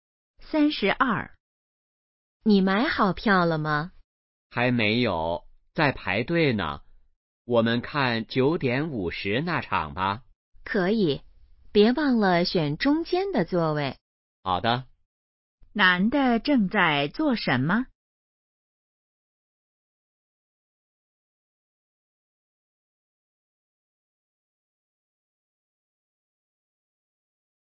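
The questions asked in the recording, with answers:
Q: 男的正在做什么?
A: 排队买票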